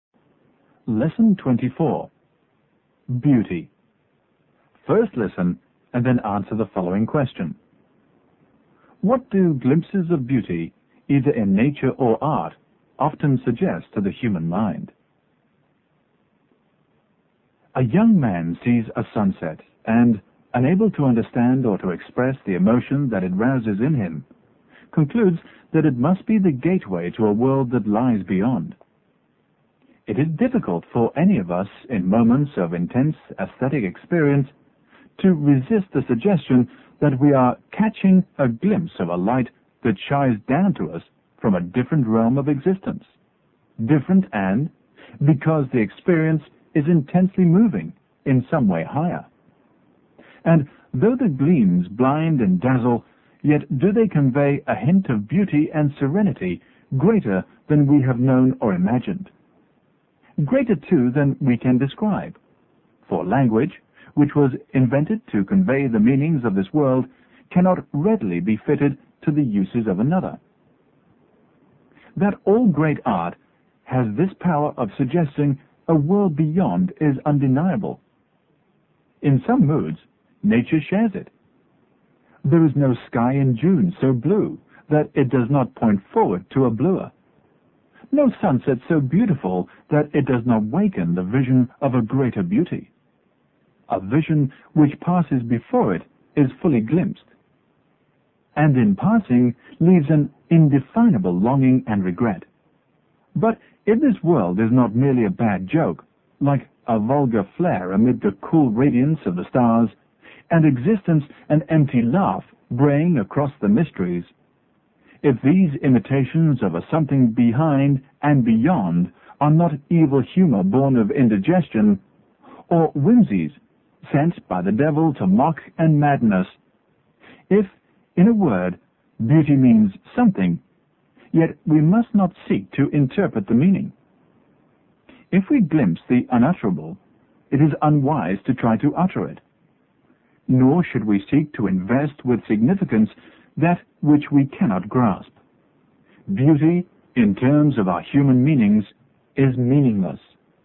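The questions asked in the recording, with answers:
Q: What do glimpses of beauty, either in nature or art, often suggest to the human mind?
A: That there is a different, higher world or realm of existence beyond this one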